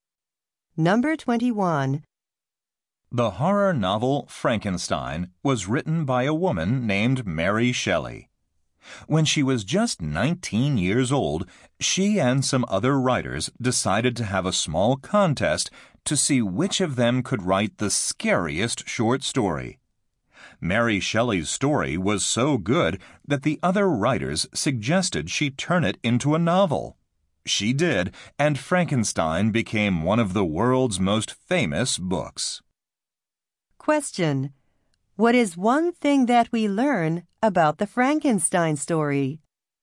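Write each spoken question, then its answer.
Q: What is one thing that we learn about the Frankenstein story?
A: It began as an entry in a scary story contest.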